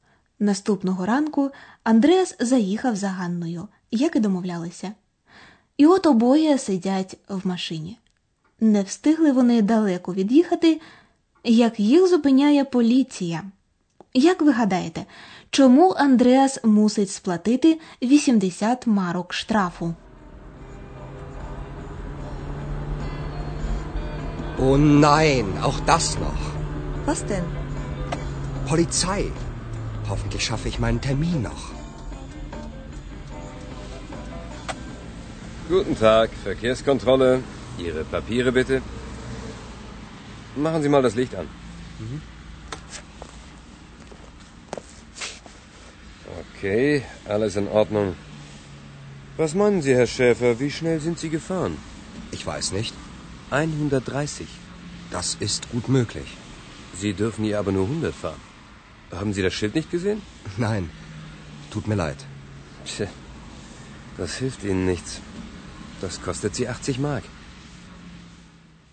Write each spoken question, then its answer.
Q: Як ви гадаєте, чому Андреас мусить сплатити 80 марок штрафу?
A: Андреас має сплатити 80 марок штрафу, тому що він перевищив швидкість.